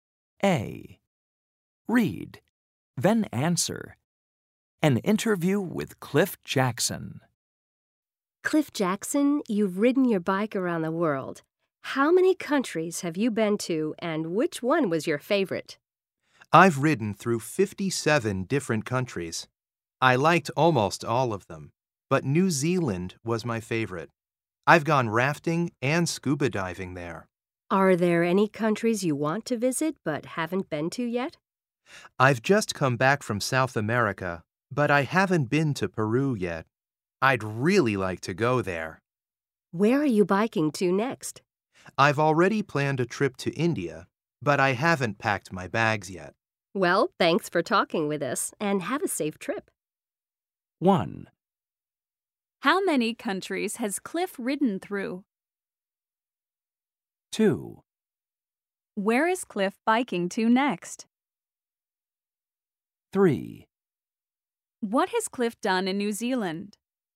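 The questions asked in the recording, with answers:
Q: How many countries has Cliff ridden through?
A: 57

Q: Where is Cliff biking to next?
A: India

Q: What has Cliff done in New Zealand?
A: He has gone rafting and scuba diving.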